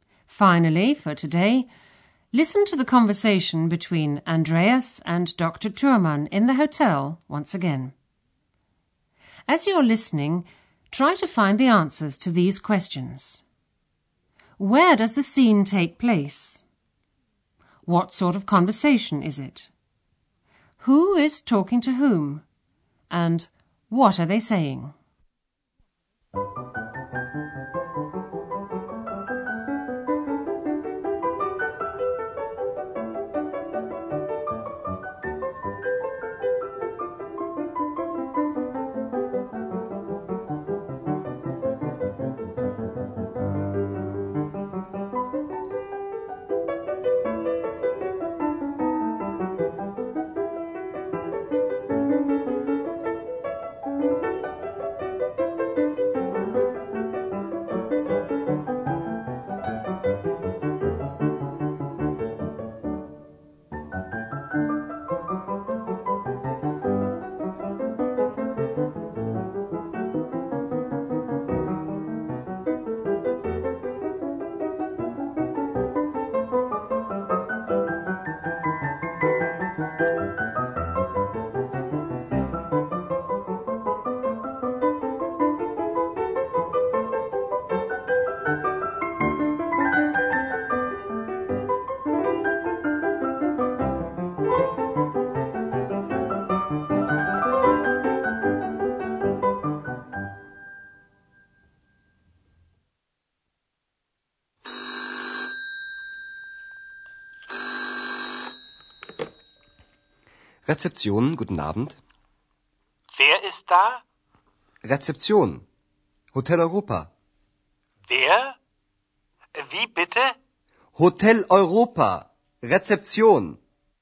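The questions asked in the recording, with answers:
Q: Where does the scene take place?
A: At the Hotel Europa reception

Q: Who is talking to whom?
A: Andreas and Dr. Thürmann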